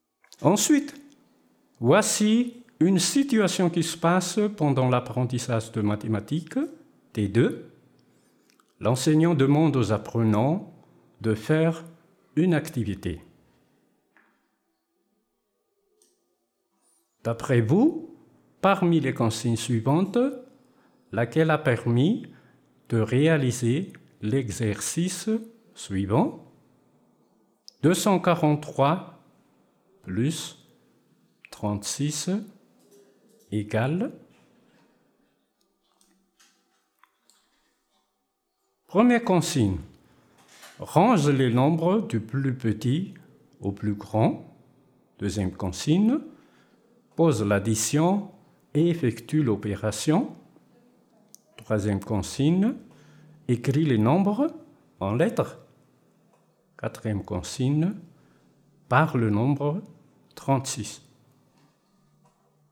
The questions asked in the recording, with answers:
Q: D'après vous, parmi les consignes suivantes, laquelle a permis de réaliser l'exercice suivant?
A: oui, la bonne réponse c'est 2, pose l'addition et effectue l'opération.